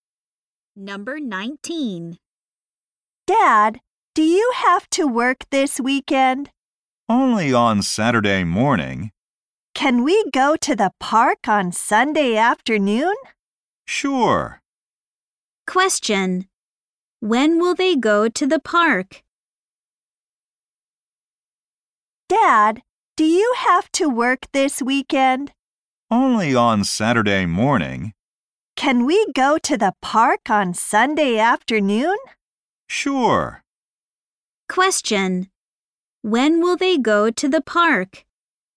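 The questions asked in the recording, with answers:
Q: When will they go to the park?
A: On Sunday afternoon.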